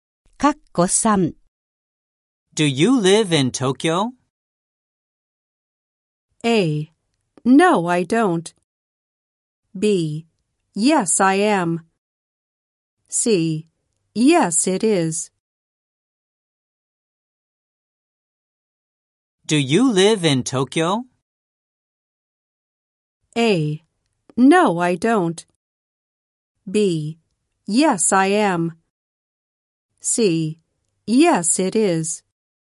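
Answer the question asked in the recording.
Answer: A: No, I don't.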